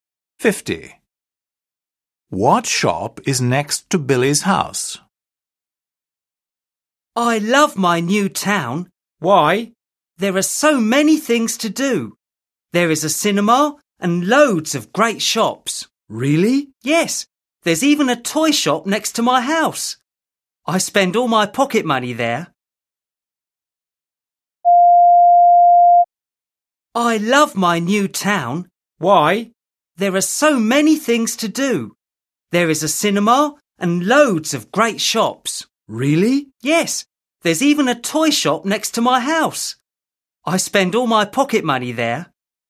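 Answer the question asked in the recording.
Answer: a toy shop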